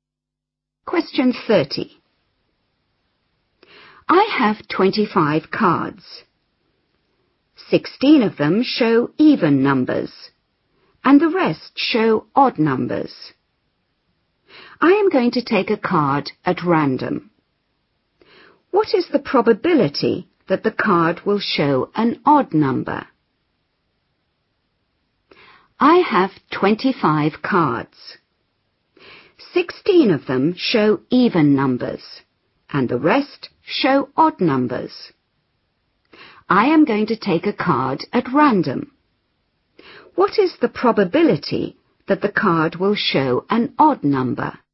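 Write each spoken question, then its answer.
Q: What is the probability that the card will show an odd number?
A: 9/25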